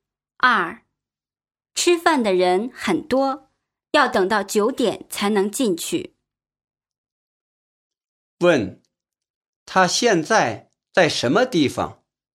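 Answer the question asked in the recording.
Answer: 饭馆外面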